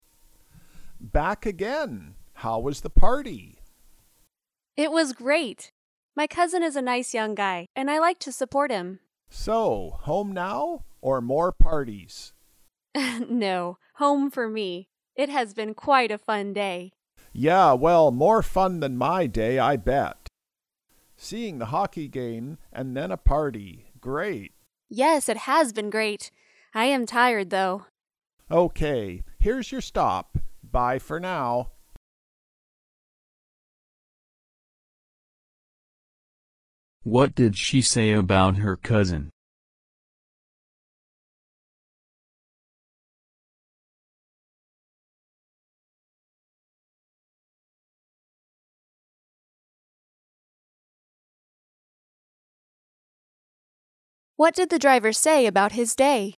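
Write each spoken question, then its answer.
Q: What did she say about her cousin?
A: He is a nice young guy, and she likes to support him.

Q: What did the driver say about his day?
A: It was less fun than her day.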